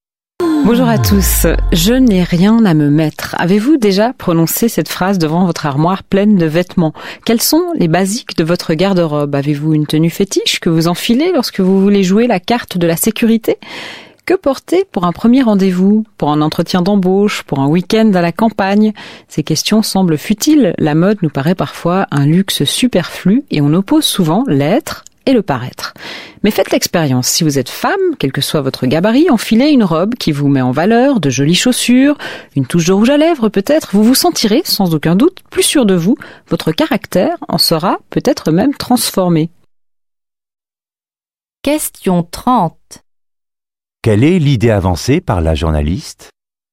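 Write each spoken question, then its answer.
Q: Quelle est l'idée avancée par la journaliste ?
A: Les vêtements influencent la confiance en soi, voire le caractère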